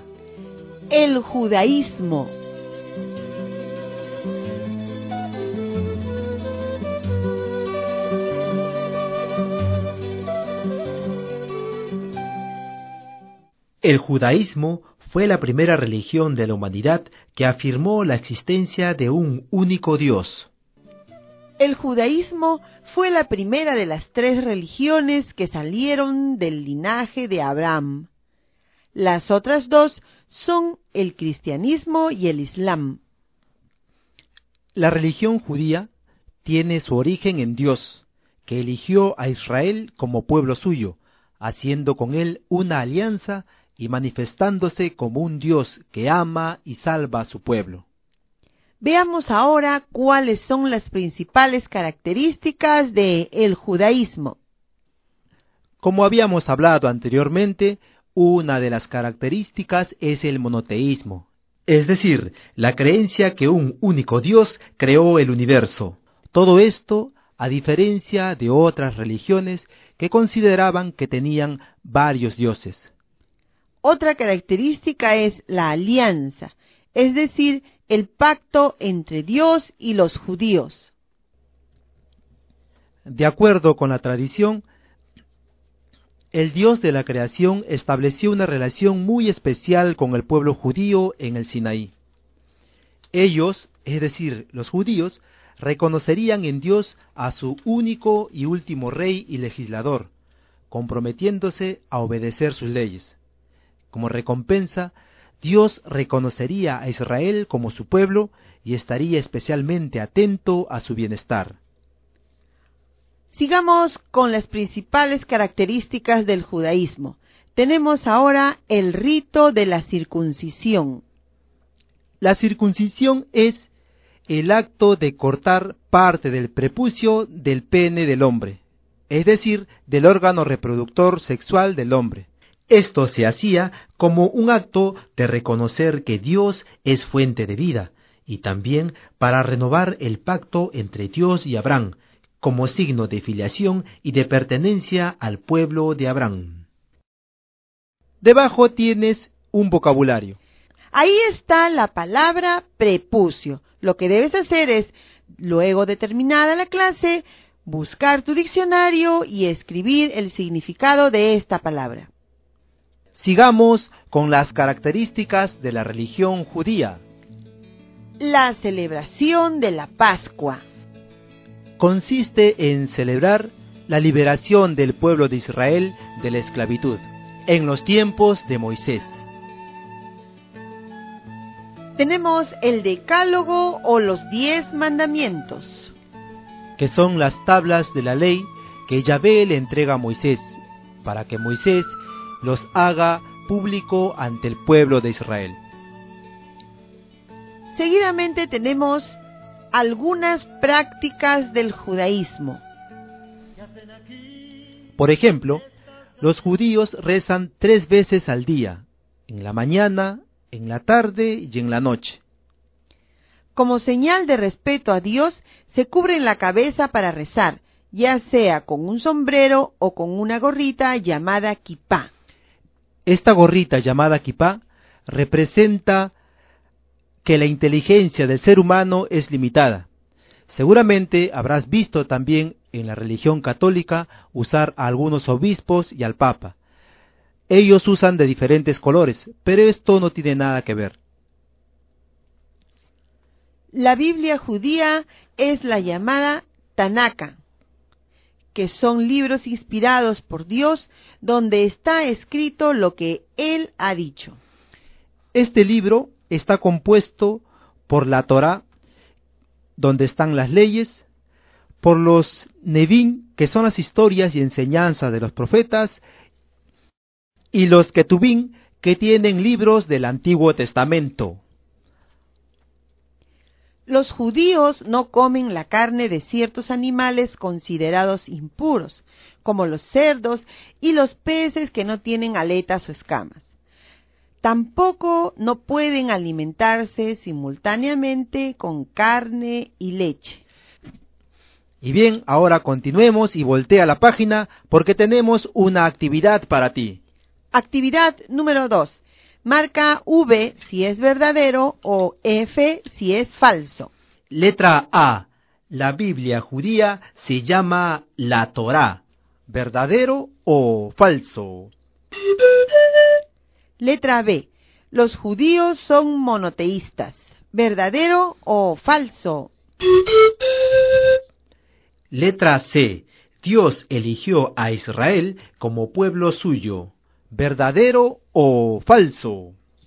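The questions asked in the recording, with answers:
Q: Letra A. La Biblia judía se llama la Torá.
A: Falso (se llama Tanaka)

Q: Letra B. Los judíos son monoteístas.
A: Verdadero

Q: Letra C. Dios eligió a Israel como pueblo suyo.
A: Verdadero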